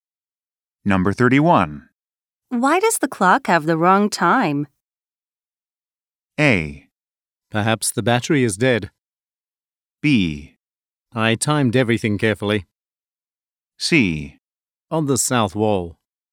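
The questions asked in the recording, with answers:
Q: Why does the clock have the wrong time?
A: A: Perhaps the battery is dead.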